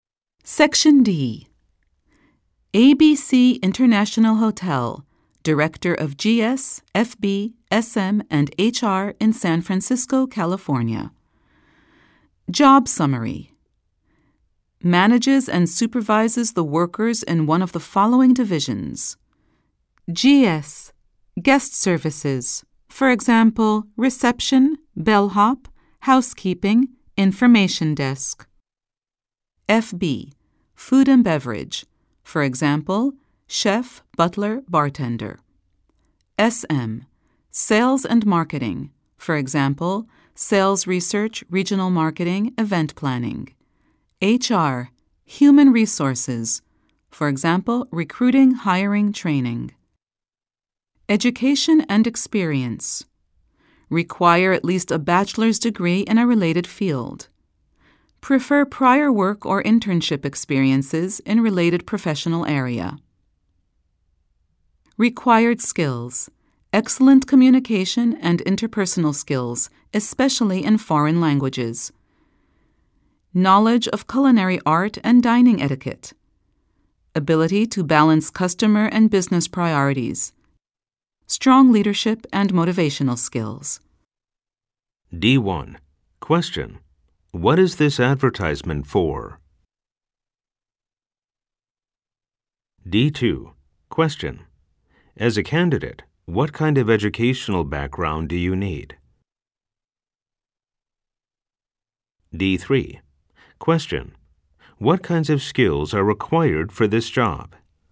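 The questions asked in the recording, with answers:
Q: What is this advertisement for?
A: A job as Director of GS, FB, SM or HR at ABC International Hotel in San Francisco

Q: As a candidate, what kind of educational background do you need?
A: At least a bachelor's degree in a related field

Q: What kinds of skills are required for this job?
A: Communication and interpersonal skills (especially foreign languages), knowledge of culinary art and dining etiquette, ability to balance customer and business priorities, strong leadership and motivational skills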